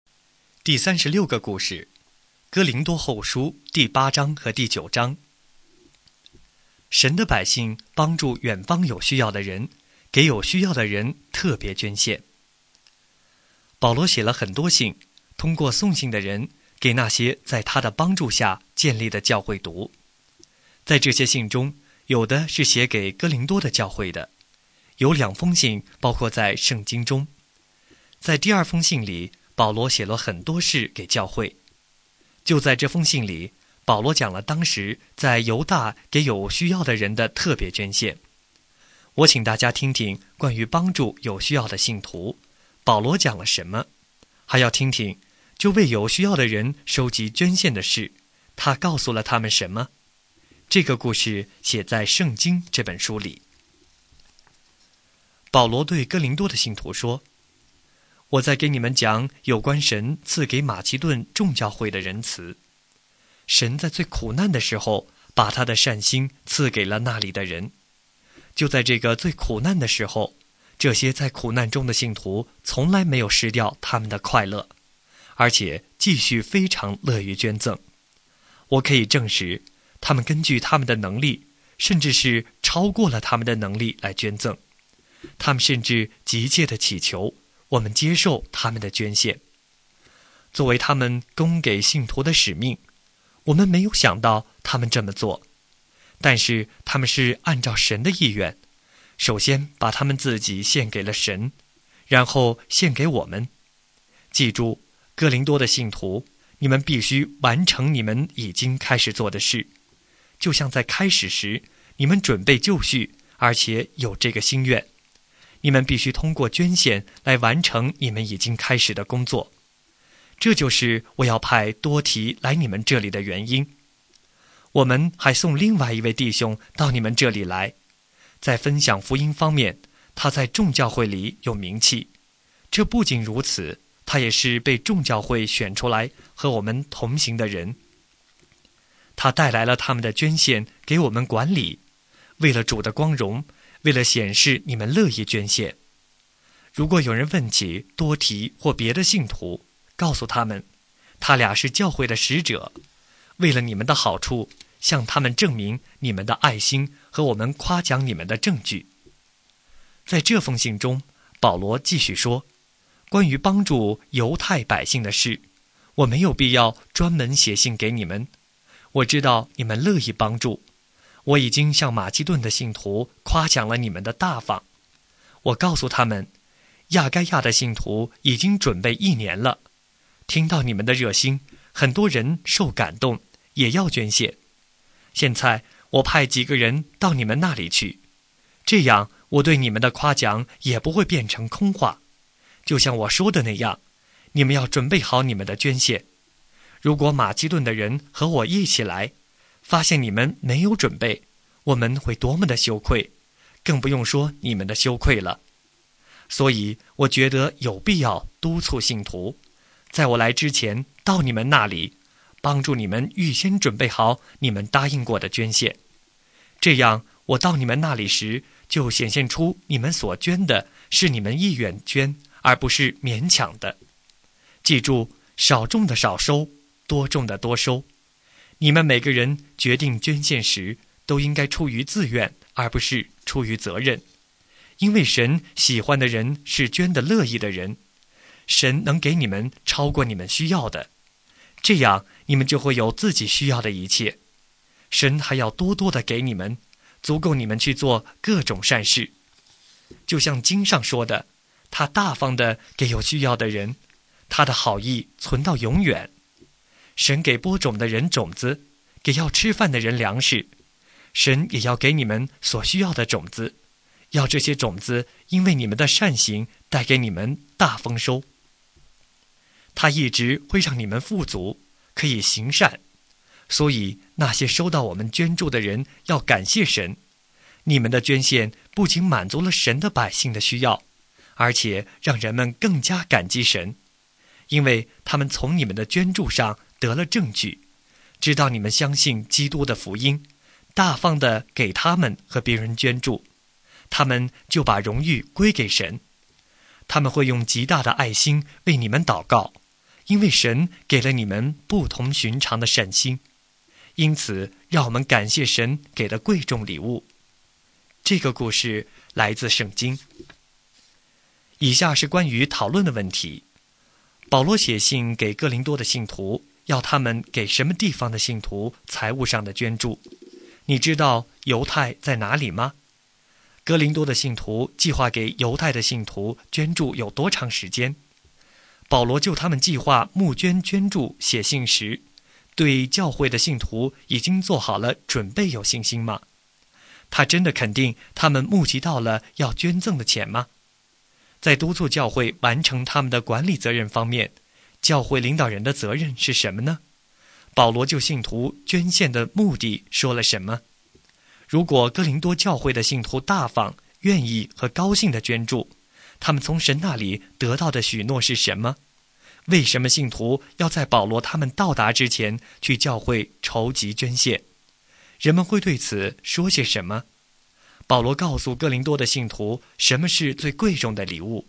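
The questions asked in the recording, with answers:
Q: 保罗写信给哥林多的信徒,要他们给什么地方的信徒财务上的捐助?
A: 犹太(犹大)

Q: 哥林多的信徒计划给犹太的信徒捐助有多长时间?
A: 一年

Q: 如果哥林多教会的信徒大方、愿意和高兴地捐助,他们从神那里得到的许诺是什么?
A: 神会给他们超过所需要的,足够去做各种善事

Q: 为什么信徒要在保罗他们到达之前去教会筹集捐献?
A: 以便预先准备好答应过的捐献,显出是乐意捐的,不是勉强的,也免得保罗的夸奖落空而羞愧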